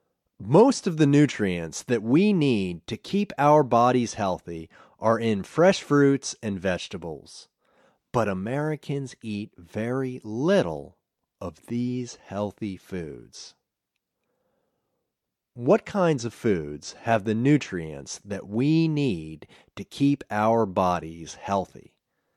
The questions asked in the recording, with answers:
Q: What kinds of foods have the nutrients that we need to keep our bodies healthy?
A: Fresh fruits and vegetables have the nutrients we need to keep our bodies healthy.